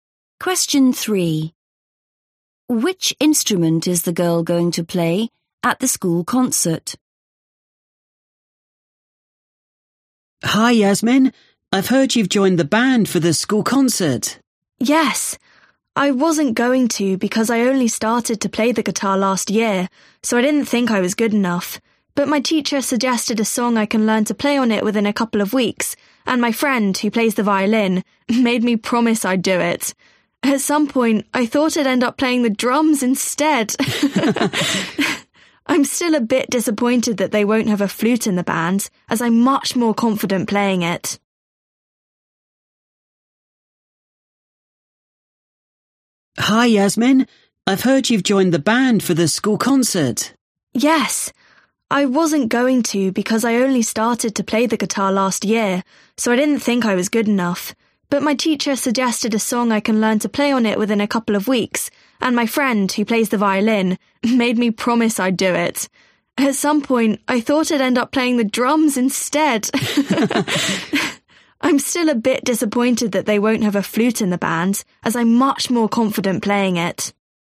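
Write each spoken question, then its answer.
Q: Which instrument is the girl going to play at the school concert?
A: The guitar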